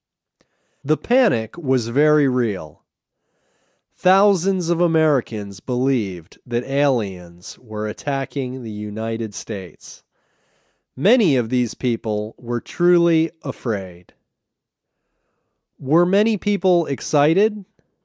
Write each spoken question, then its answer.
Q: Were many people excited?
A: No, many people weren't excited.